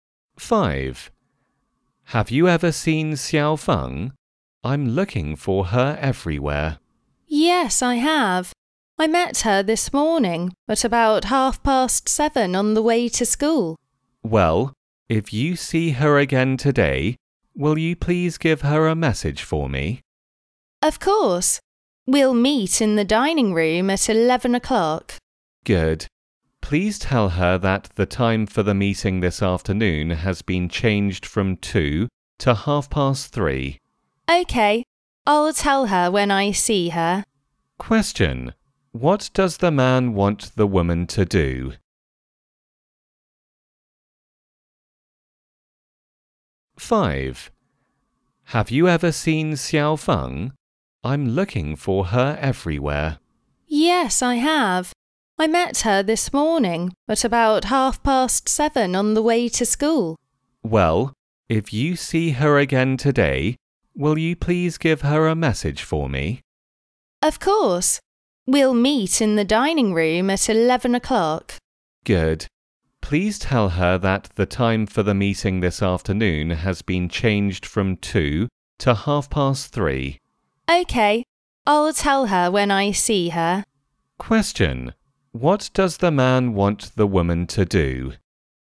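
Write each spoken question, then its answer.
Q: What does the man want the woman to do?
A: Tell Xiao Feng the meeting time has changed from 2 to 3:30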